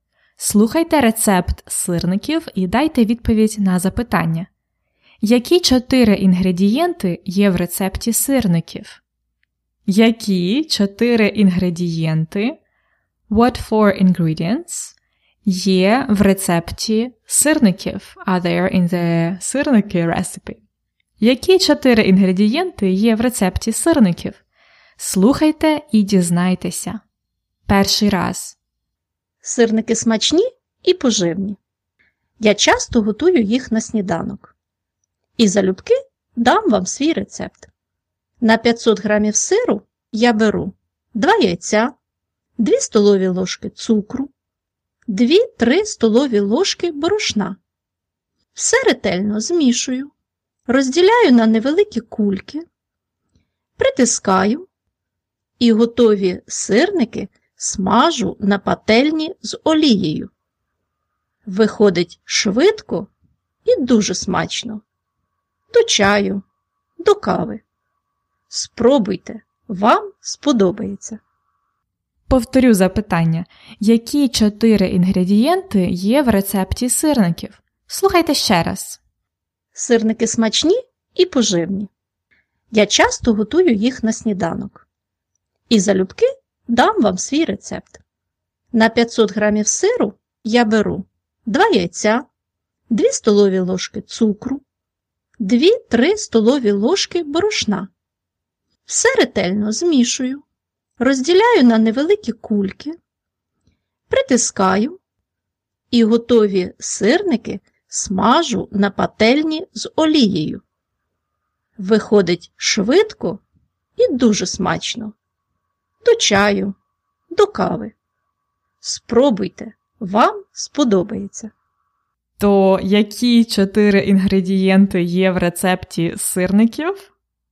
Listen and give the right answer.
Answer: Тому чотири інгредієнти це сир, яйця, цукор і борошно.